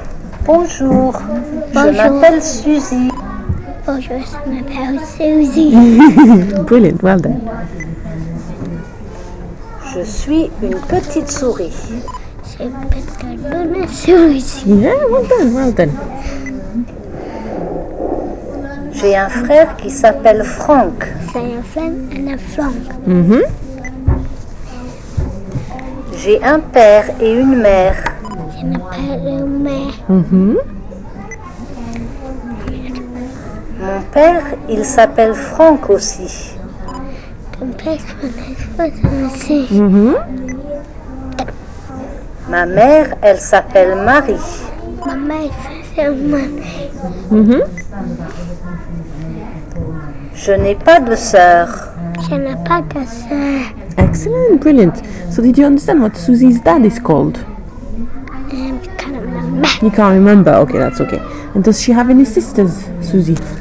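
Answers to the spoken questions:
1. Franck
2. No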